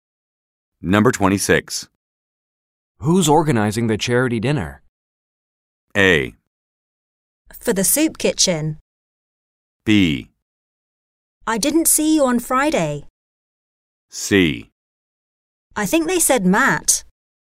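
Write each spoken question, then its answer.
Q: Who's organizing the charity dinner?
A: C: I think they said Matt.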